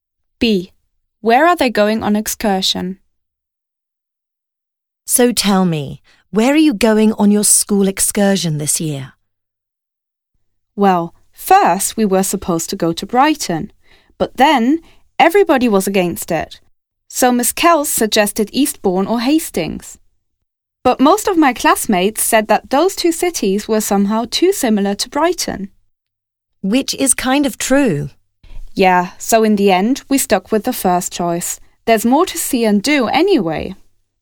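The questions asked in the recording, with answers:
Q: Where are they going on excursion?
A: Brighton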